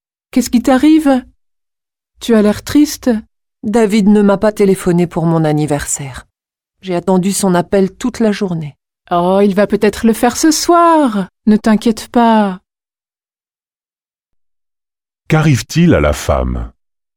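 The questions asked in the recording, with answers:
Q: Qu'arrive-t-il à la femme ?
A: Elle est triste parce que David ne lui a pas téléphoné pour son anniversaire.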